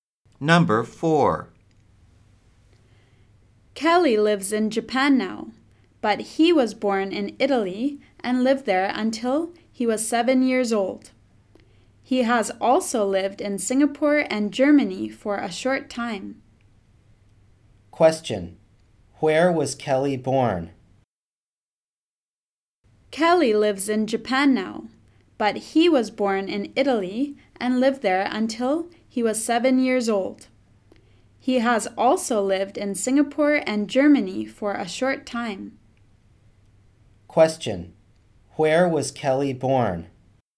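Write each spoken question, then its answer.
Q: Where was Kelly born?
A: In Italy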